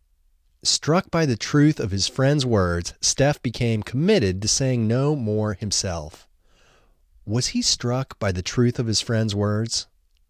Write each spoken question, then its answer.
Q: Was he struck by the truth of his friend's words?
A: Yes, he was struck by the truth of his friend's words.